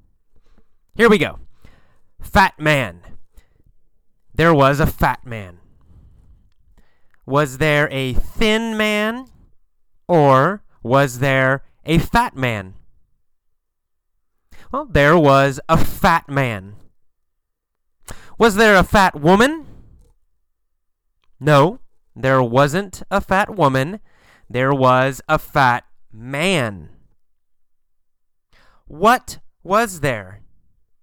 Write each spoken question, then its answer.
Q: What was there?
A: A fat man. There was a fat man.